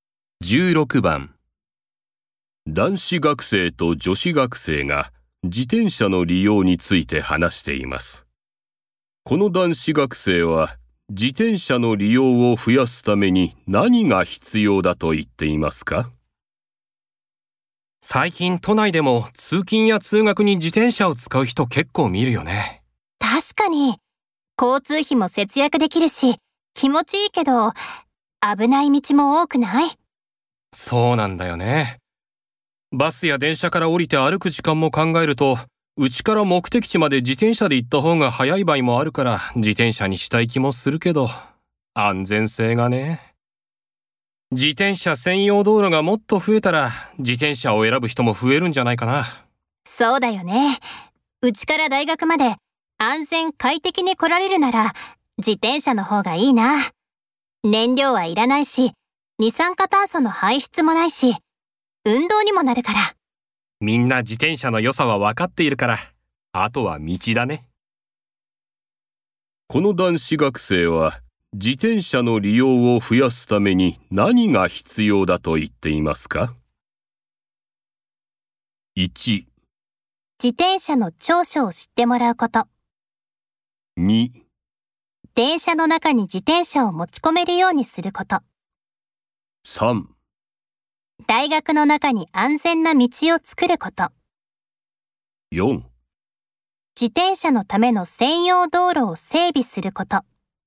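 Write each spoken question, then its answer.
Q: この男子学生は自転車の利用を増やすために何が必要だと言っていますか?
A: 4: 自転車のための専用道路を整備すること。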